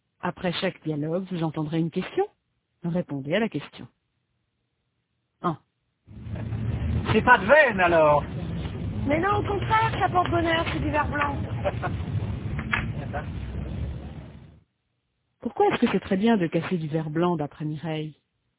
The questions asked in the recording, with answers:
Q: Pourquoi est-ce que c'est très bien de casser du verre blanc d'après Mireille?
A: Parce que ça porte bonheur.